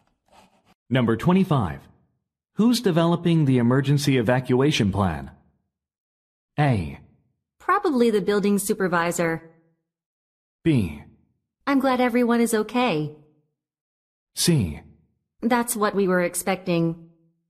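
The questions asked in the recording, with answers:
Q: Who's developing the emergency evacuation plan?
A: A: Probably the building supervisor.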